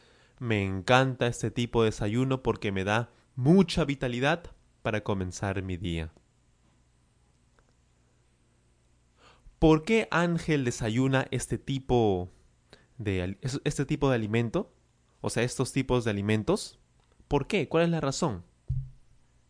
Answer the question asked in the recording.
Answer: porque le da mucha vitalidad para comenzar su día.